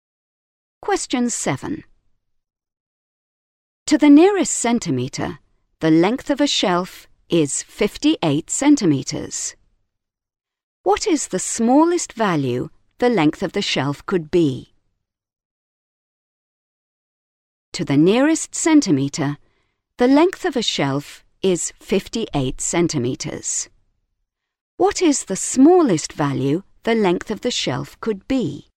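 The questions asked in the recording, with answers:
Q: What is the smallest value the length of the shelf could be?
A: 57.5 centimetres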